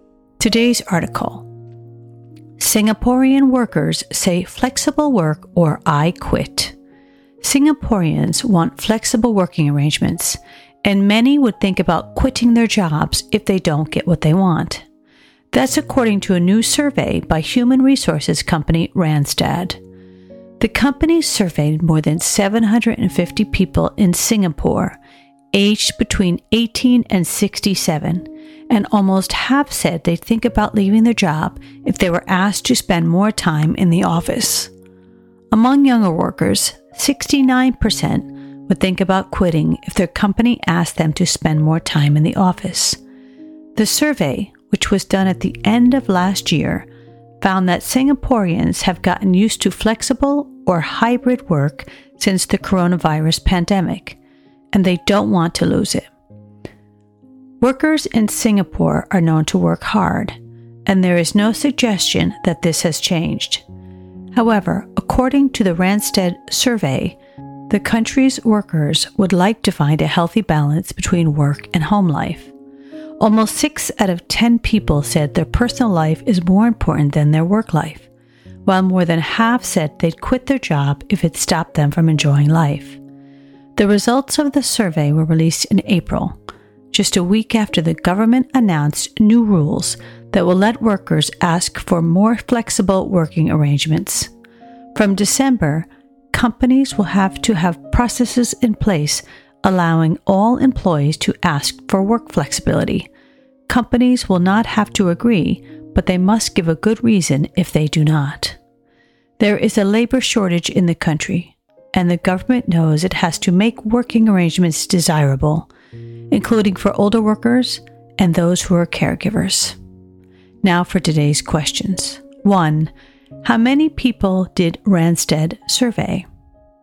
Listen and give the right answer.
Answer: Answer, 750 people.